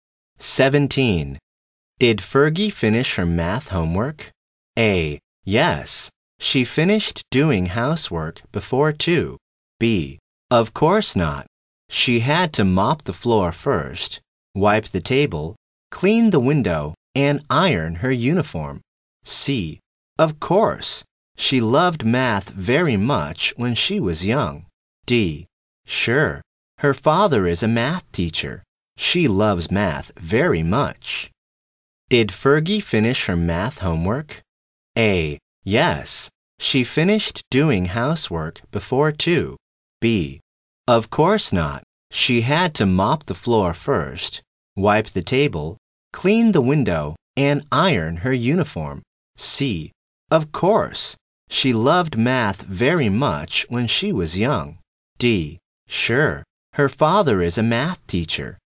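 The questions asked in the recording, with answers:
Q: Did Fergie finish her math homework?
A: B: Of course not. She had to mop the floor first, wipe the table, clean the window, and iron her uniform.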